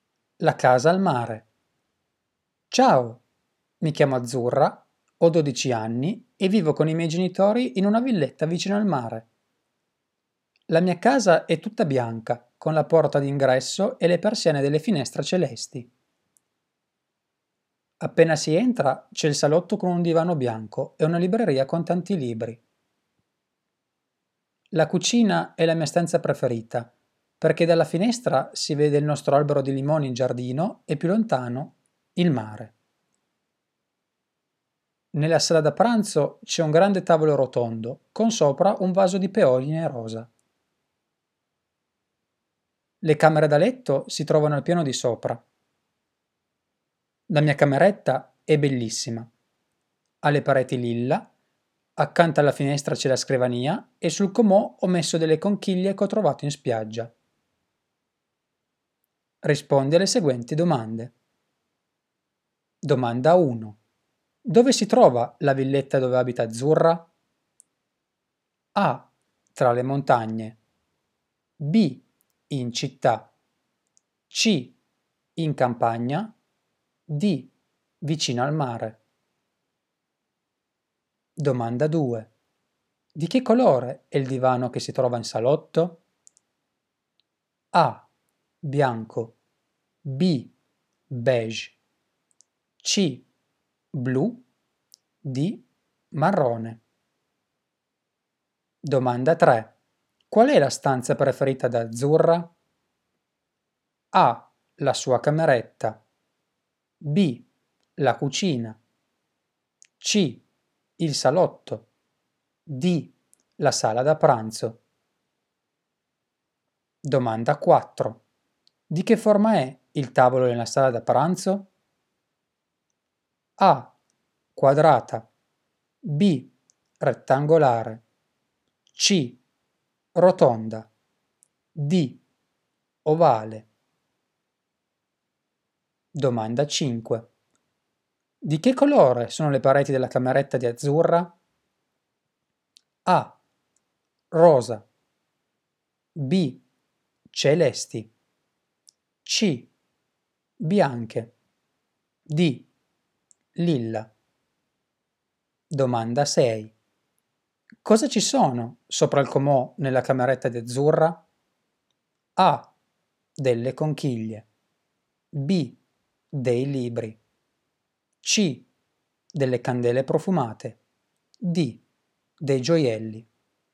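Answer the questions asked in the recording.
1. D: Vicino al mare.
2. A: Bianco.
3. B: La cucina.
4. C: Rotonda.
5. D: Lilla.
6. A: Delle conchiglie.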